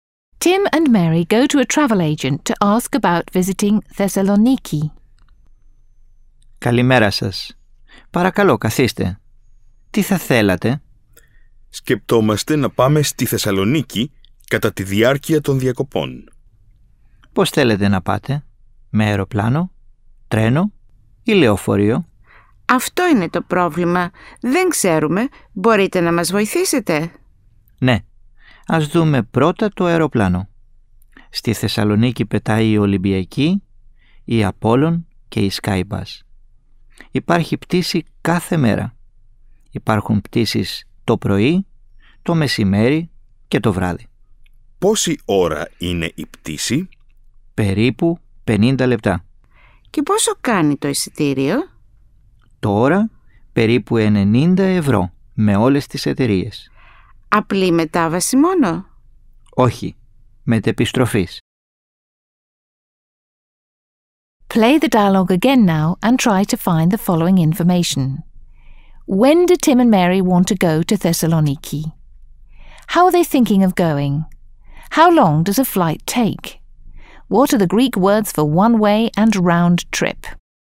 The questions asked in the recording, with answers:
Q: When do Tim and Mary want to go to Thessaloniki?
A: Tim and Mary want to go to Thessaloniki during their holidays.

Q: How are they thinking of going?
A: They don't know by what means they'll get there.

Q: How long does a flight take?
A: A flight will take approximately 50 minutes.

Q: What are the Greek words for one way and round trip?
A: The Greek words for one way and round trip are απλή μετάβαση and μετεπιστροφής.